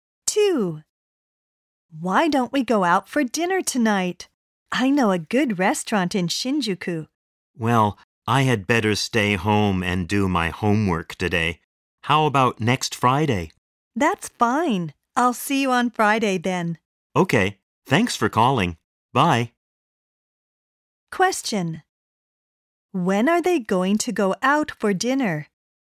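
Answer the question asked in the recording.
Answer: Next Friday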